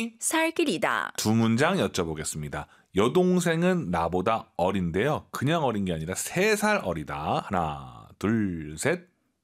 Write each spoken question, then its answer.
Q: 여동생은 나보다 어린데요. 그냥 어린 게 아니라 세 살 어리다.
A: 妹妹比我小三岁.